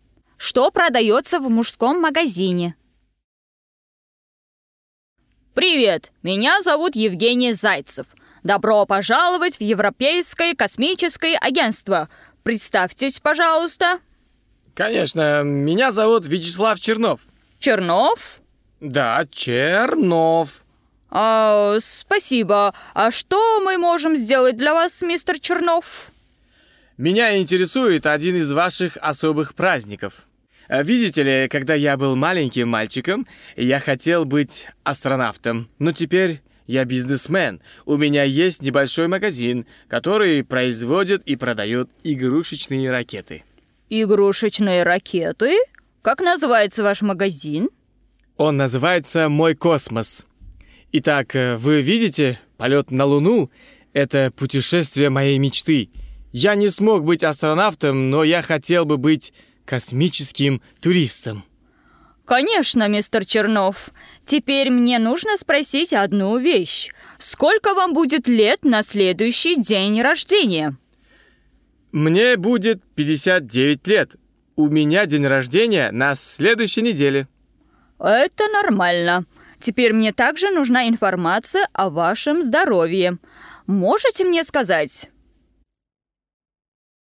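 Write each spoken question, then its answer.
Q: Что продается в мужском магазине?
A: игрушечные ракеты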